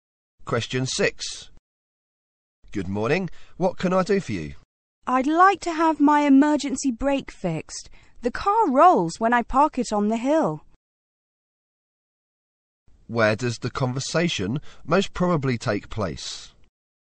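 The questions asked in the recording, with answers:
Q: Where does the conversation most probably take place?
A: At a garage (car repair shop).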